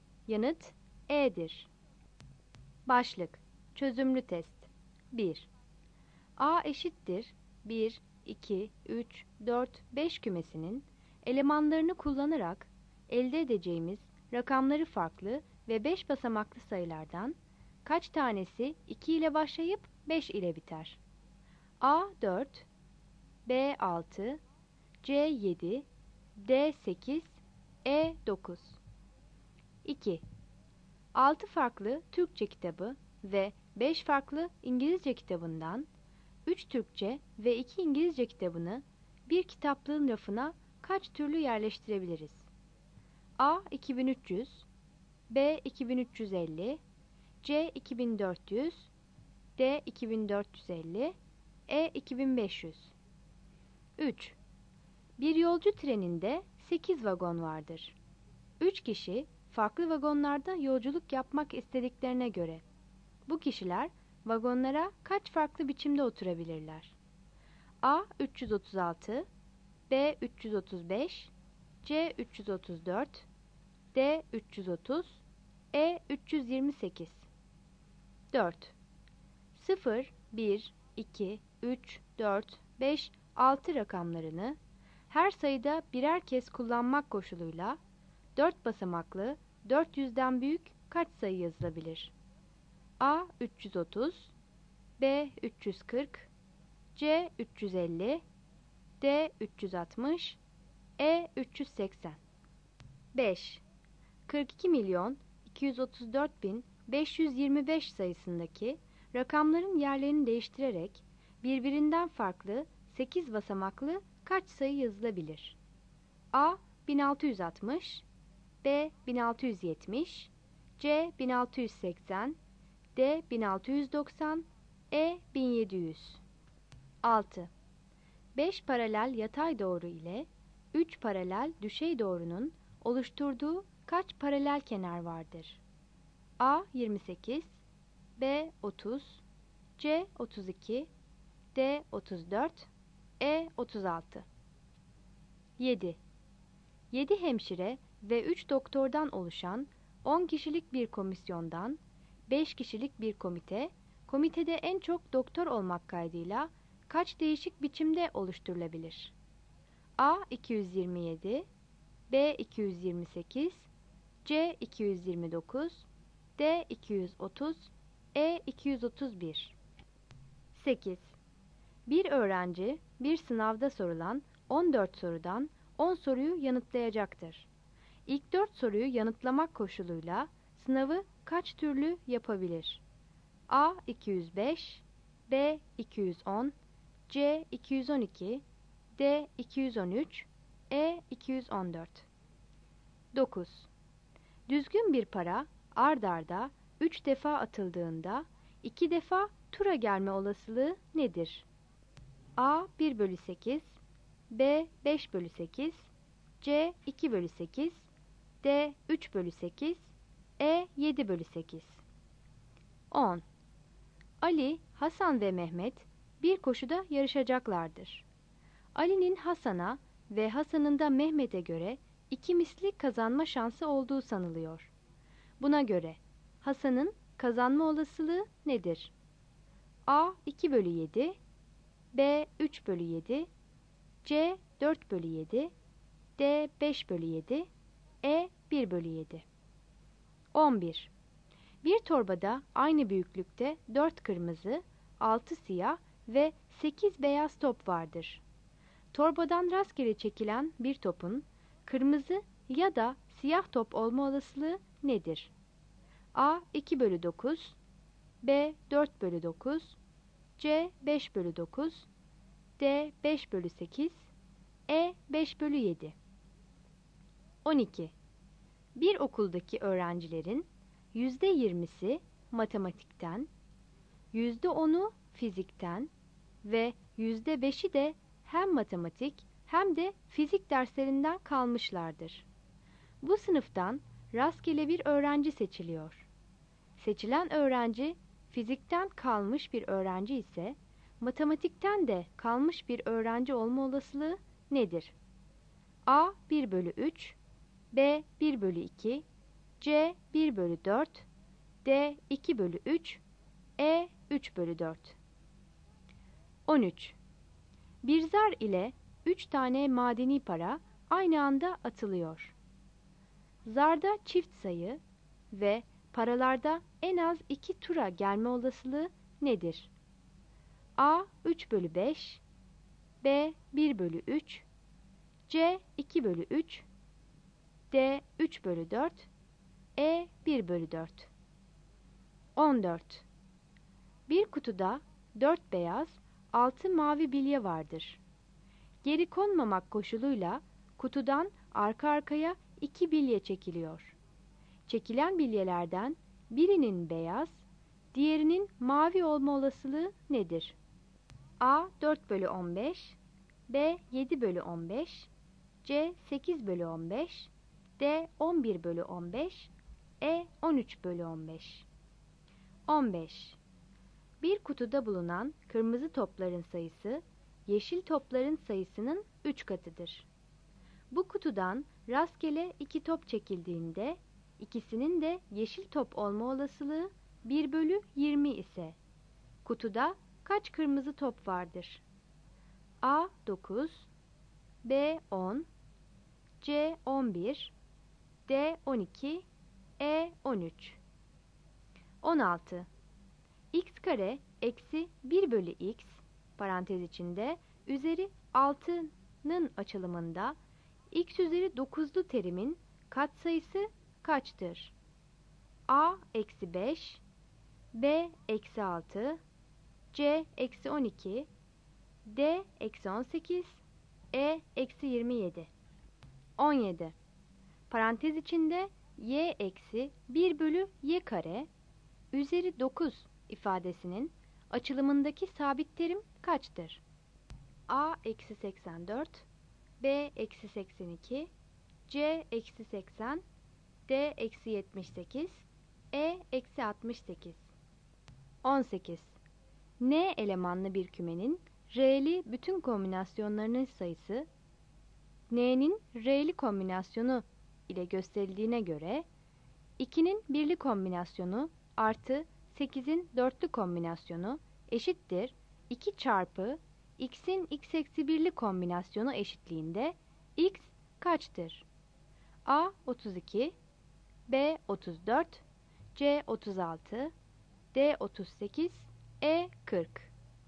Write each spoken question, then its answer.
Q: A eşittir 1, 2, 3, 4, 5 kümesinin elemanlarını kullanarak elde edeceğimiz rakamları farklı ve 5 basamaklı sayılardan kaç tanesi 2 ile başlayıp 5 ile biter?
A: Yanıt B'dir.

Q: 3 kişi farklı vagonlarda yolculuk yapmak istediklerine göre bu kişiler vagonlara kaç farklı biçimde oturabilirler?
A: Yanıt A'dır.

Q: 0, 1, 2, 3, 4, 5, 6 rakamlarını her sayıda birer kez kullanmak koşuluyla 4 basamaklı 400'den büyük kaç sayı yazılabilir?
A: Yanıt D'dir.

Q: 42.234.525 sayısındaki rakamların yerlerini değiştirerek birbirinden farklı 8 basamaklı kaç sayı yazılabilir?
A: Yanıt C'dir.

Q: 5 paralel yatay doğru ile 3 paralel düşey doğrunun oluşturduğu kaç paralel kenar vardır?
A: Yanıt B'dir.

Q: İlk 4 soruyu yanıtlamak koşuluyla sınavı kaç türlü yapabilir?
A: Yanıt B'dir.

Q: Düzgün bir para ard arda 3 defa atıldığında 2 defa tura gelme olasılığı nedir?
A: Yanıt D'dir.

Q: Buna göre Hasan'ın kazanma olasılığı nedir?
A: Yanıt A'dır.

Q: Torbadan rastgele çekilen bir topun kırmızı ya da siyah top olma olasılığı nedir?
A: Yanıt C'dir.

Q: Seçilen öğrenci, fizikten kalmış bir öğrenci ise, matematikten de kalmış bir öğrenci olma olasılığı nedir?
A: Yanıt B'dir.

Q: Zarda çift sayı ve paralarda en az 2 tura gelme olasılığı nedir?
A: Yanıt E'dir.

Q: Çekilen bilyelerden birinin beyaz, diğerinin mavi olma olasılığı nedir?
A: Yanıt C'dir.

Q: Bu kutudan rastgele 2 top çekildiğinde, ikisinin de yeşil top olma olasılığı 1 bölü 20 ise, kutuda kaç kırmızı top vardır?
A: Yanıt D'dir.

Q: X kare eksi 1 bölü x, parantez içinde, üzeri 6'nın açılımında, x üzeri 9'lu terimin katsayısı kaçtır?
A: Yanıt B'dir.

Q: Parantez içinde y eksi 1 bölü y kare, üzeri 9 ifadesinin açılımındaki sabit terim kaçtır?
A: Yanıt A'dır.

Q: N elemanlı bir kümenin R'li bütün kombinasyonlarının sayısı, N'nin R'li kombinasyonu ile gösterildiğine göre, 2'nin birli kombinasyonu artı 8'in dörtlü kombinasyonu eşittir 2 çarpı x'in x eksi 1'li kombinasyonu eşitliğinde x kaçtır?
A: Yanıt C'dir.